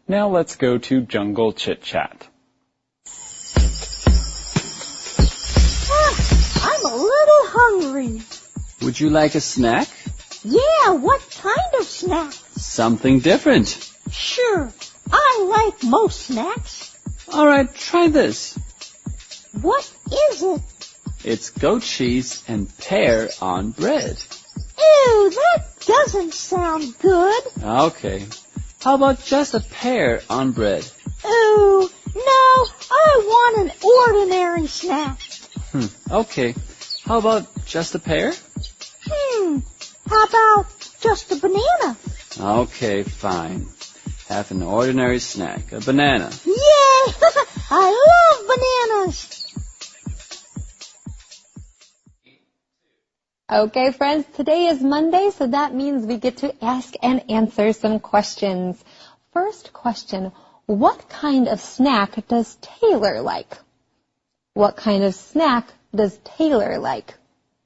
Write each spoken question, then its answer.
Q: What kind of snack does Taylor like?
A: She likes ordinary snacks.